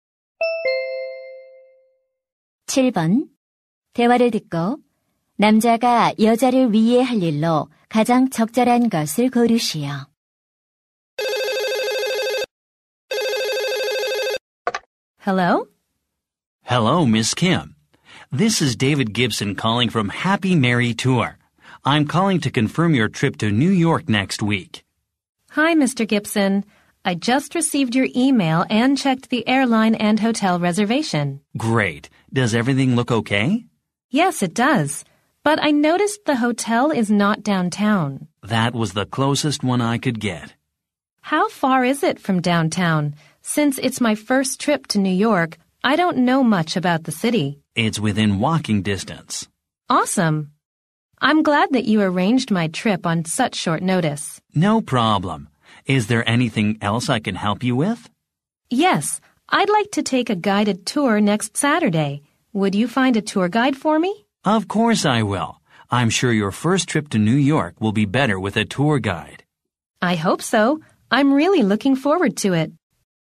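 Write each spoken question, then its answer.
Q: 대화를 듣고 남자가 여자를 위해 할 일로 가장 적절한 것을 고르시오.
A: 여행 가이드 찾아 주기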